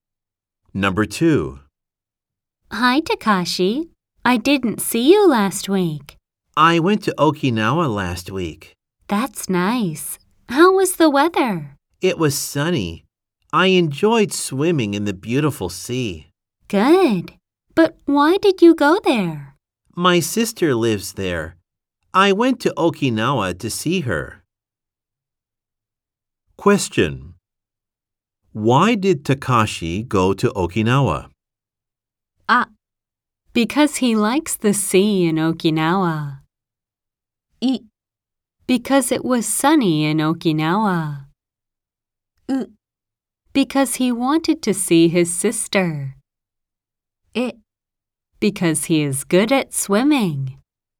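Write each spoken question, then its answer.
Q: Why did Takashi go to Okinawa?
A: う: Because he wanted to see his sister.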